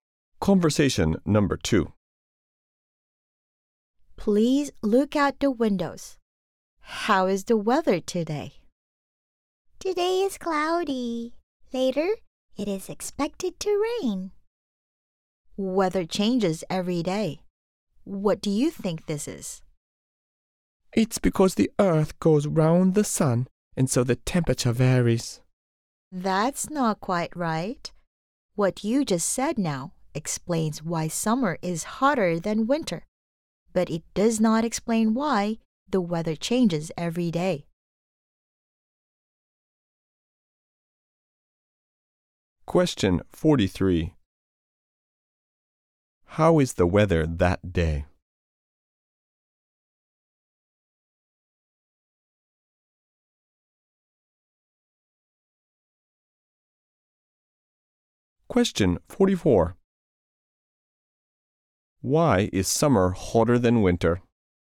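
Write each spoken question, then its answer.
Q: How is the weather that day?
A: Cloudy, and it is expected to rain later.

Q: Why is summer hotter than winter?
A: Because the Earth goes round the sun, so the temperature varies.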